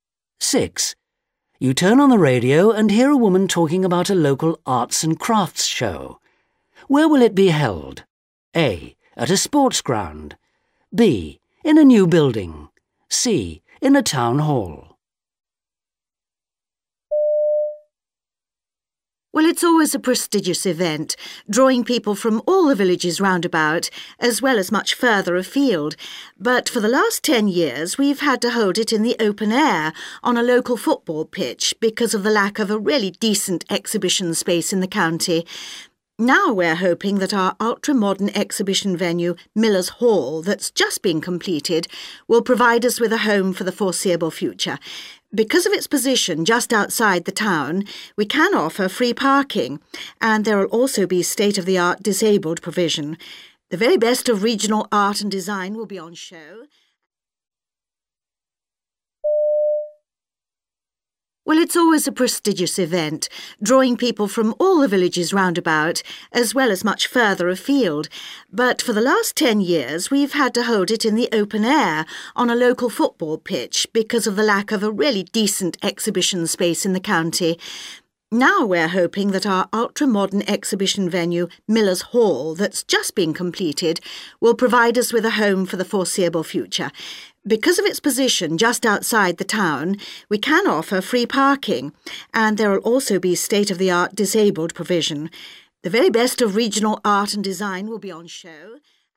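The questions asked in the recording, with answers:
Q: Where will it be held?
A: B: In a new building.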